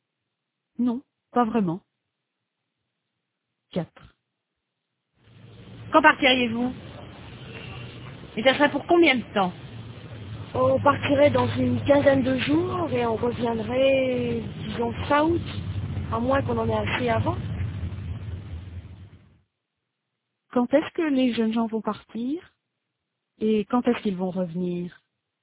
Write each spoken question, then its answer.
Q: Quand est-ce que les jeunes gens vont partir?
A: Ils partiraient dans une quinzaine de jours

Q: Et quand est-ce qu'ils vont revenir?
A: ils reviendraient fin août.